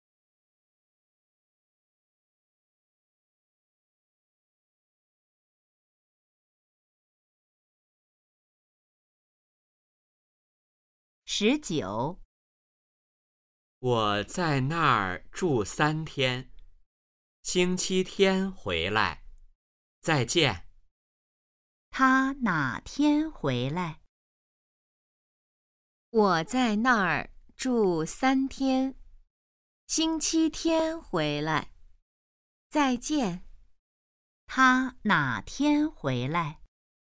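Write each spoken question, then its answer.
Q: 他哪天回来?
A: 星期天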